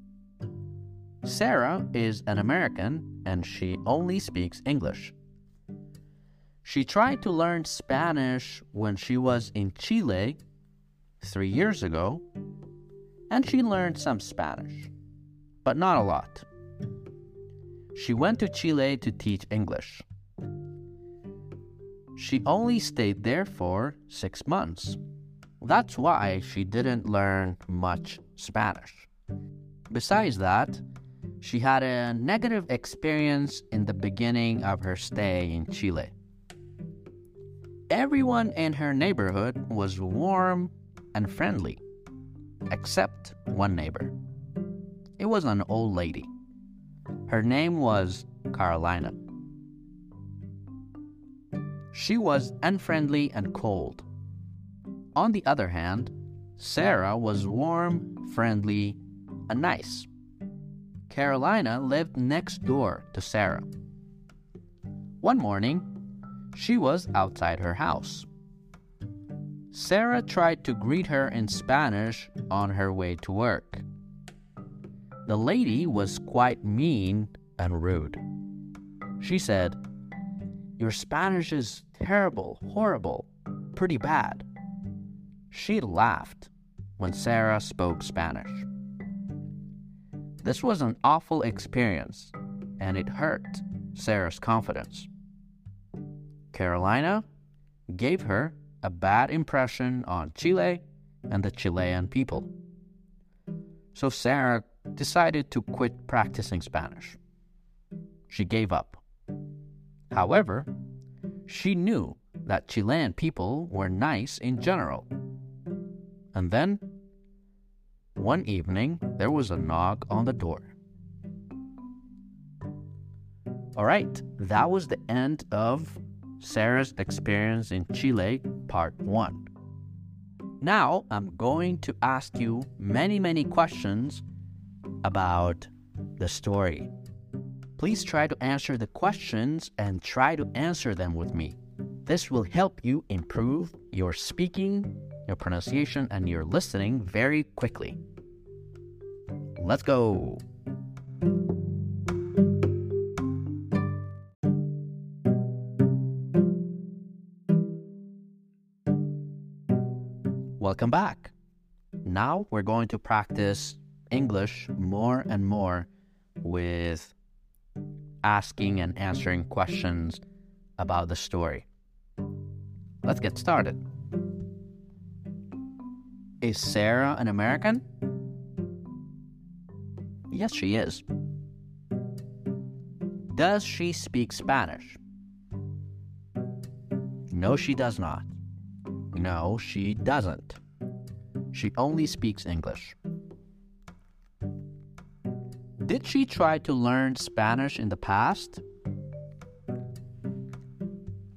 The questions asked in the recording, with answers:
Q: Did she try to learn Spanish in the past?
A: Yes, she did.